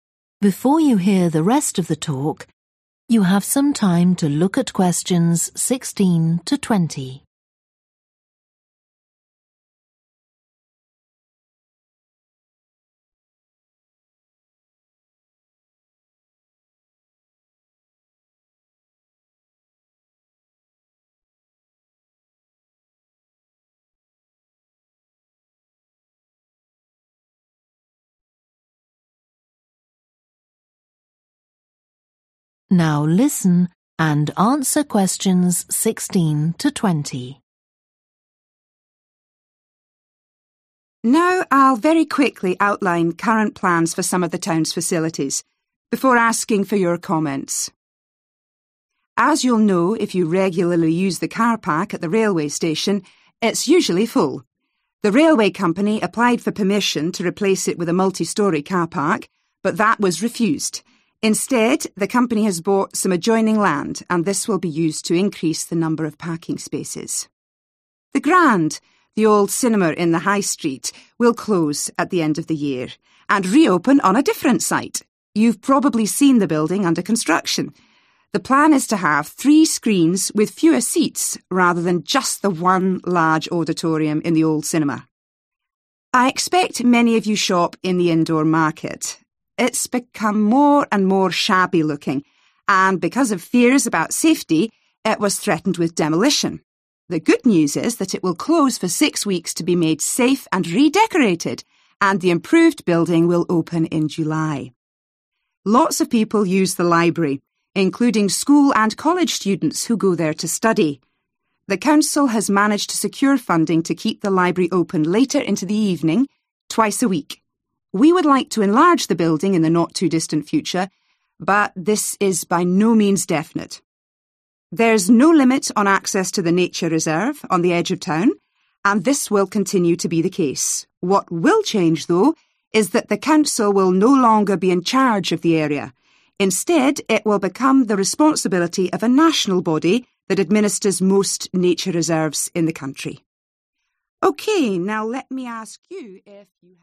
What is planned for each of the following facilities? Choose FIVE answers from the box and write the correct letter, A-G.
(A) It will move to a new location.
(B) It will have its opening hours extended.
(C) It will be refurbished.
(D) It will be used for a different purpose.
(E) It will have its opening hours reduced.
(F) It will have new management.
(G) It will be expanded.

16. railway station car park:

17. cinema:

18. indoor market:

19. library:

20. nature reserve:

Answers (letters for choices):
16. G
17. A
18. C
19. B
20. F

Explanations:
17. The Grand, the old cinema in the high street will close at the end of the year, and reopen on a different site (= move to a new location) (The Grand, rạp chiếu phim cũ trên phố sẽ đóng cửa vào cuối năm nay và mở cửa trở lại ở một địa điểm khác). You've probably seen the building under construction. The plan is to have three screens with fewer seats, rather than just the one large auditorium in the old cinema.
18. The good news is that it will close for six weeks to be made safe and redecorated (= refurbished), and the improved building will open in July. (Tin tốt là nó sẽ đóng cửa trong sáu tuần để đảm bảo an toàn và sẽ được trang trí lại, và tòa nhà sau khi cải tiến sẽ mở cửa vào tháng Bảy)